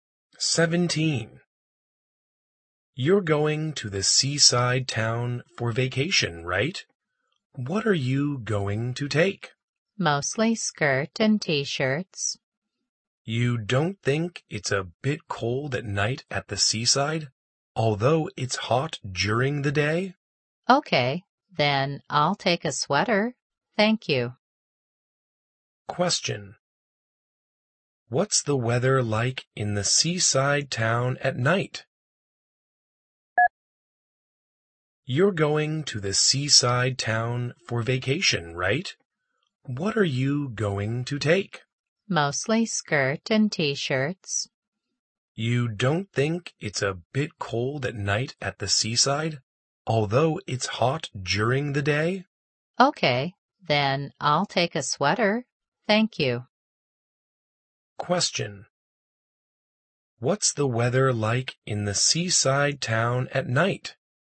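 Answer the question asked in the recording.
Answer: A bit cold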